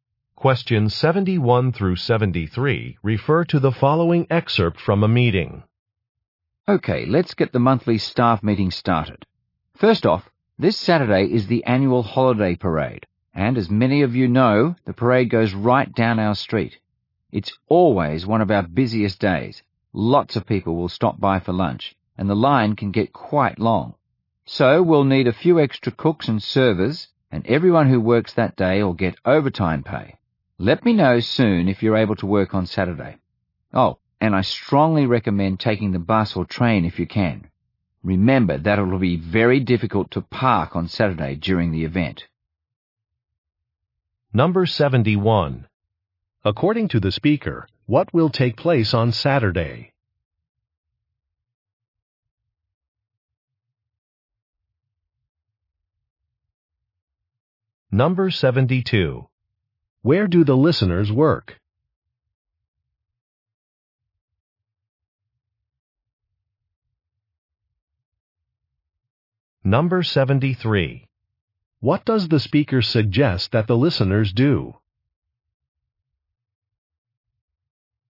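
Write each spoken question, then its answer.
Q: According to the speaker, what will take place on Saturday?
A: The annual holiday parade

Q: Where do the listeners work?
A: At a restaurant

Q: What does the speaker suggest that the listeners do?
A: Take the bus or train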